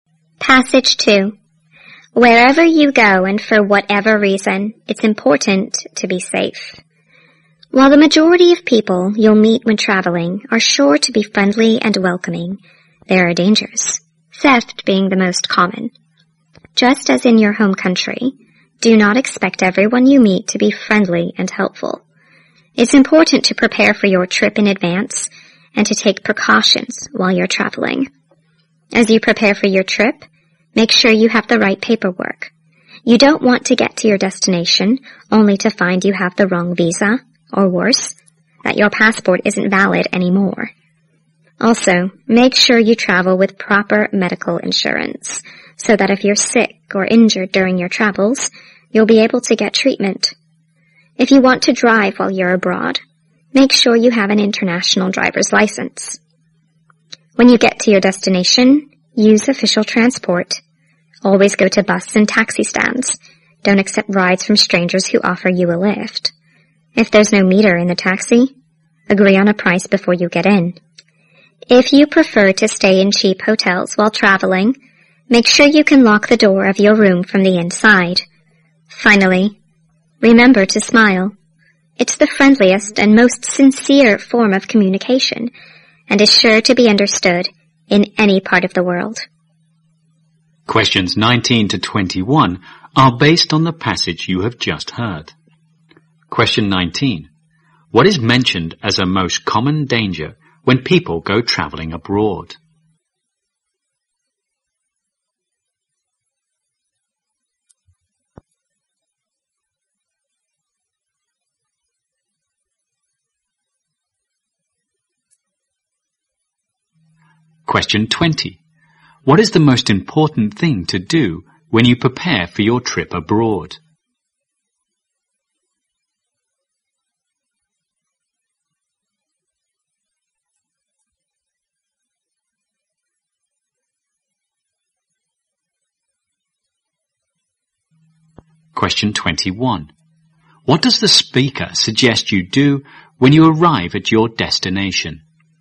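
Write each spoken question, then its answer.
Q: What is mentioned as a most common danger when people go traveling abroad?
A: Theft.

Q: What is the most important thing to do when you prepare for your trip abroad?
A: Make sure you have the right paperwork.

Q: What does the speaker suggest you do when you arrive at your destination?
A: Use official transport.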